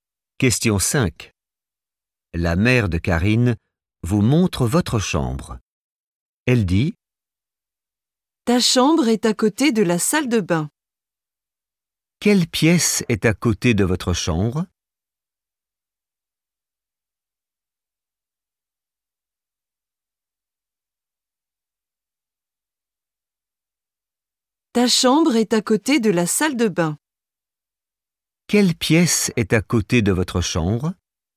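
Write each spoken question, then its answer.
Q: Quelle pièce est à côté de votre chambre?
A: la salle de bain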